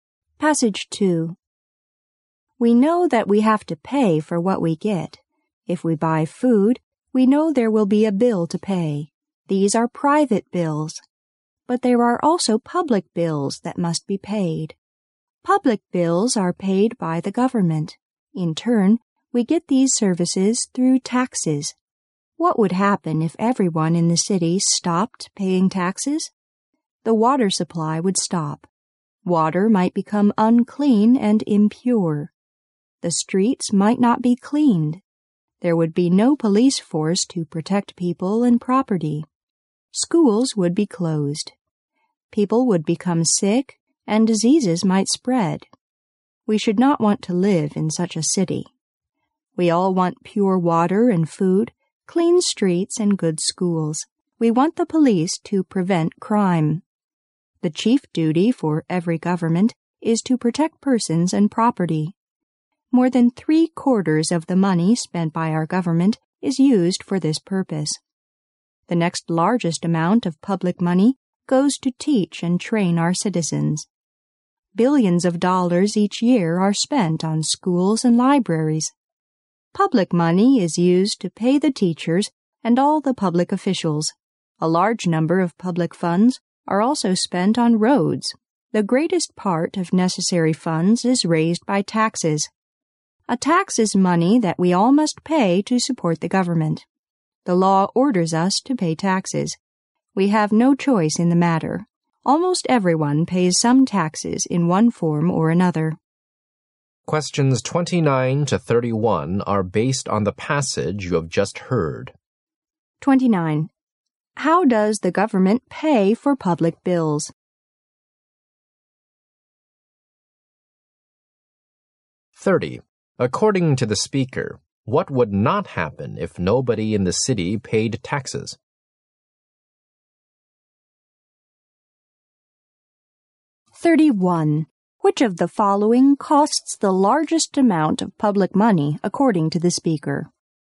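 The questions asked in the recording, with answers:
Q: How does the government pay for public bills?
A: Through taxes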